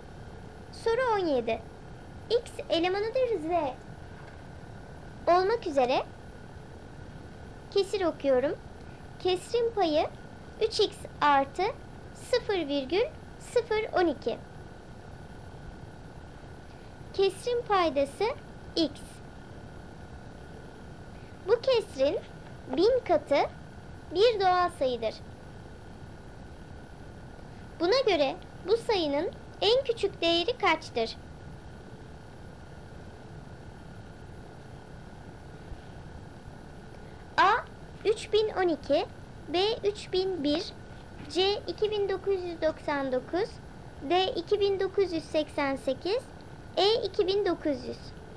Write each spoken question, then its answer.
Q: Buna göre bu sayının en küçük değeri kaçtır?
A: Doğru cevap D 2988.